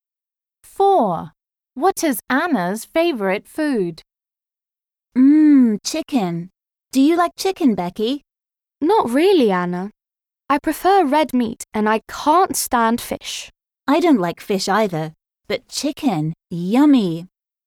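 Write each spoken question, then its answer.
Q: What is Anna's favourite food?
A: chicken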